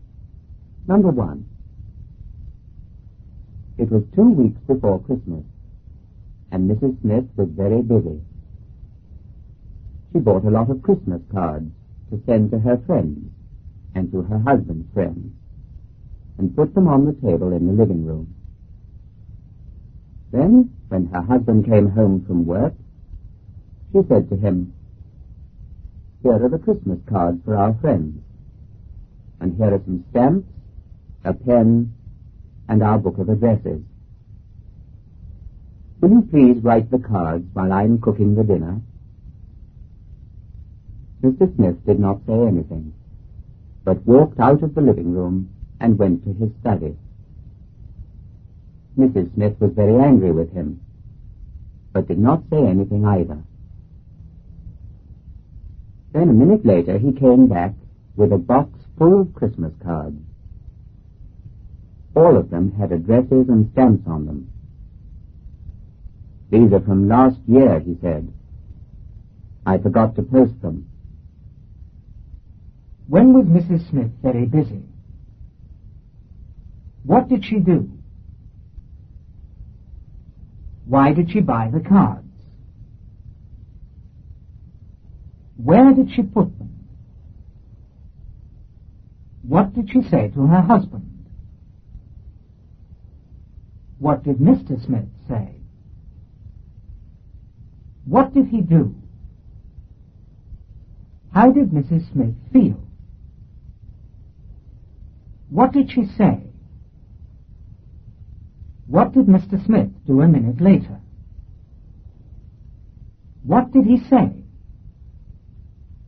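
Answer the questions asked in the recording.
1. Two weeks before Christmas
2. She bought a lot of Christmas cards
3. To send to her friends and her husband's friends
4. On the table in the living room
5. Will you please write the cards while I'm cooking the dinner?
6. He did not say anything
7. He walked out of the living room and went to his study
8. Very angry
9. She did not say anything
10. He came back with a box full of last year's Christmas cards
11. These are from last year. I forgot to post them.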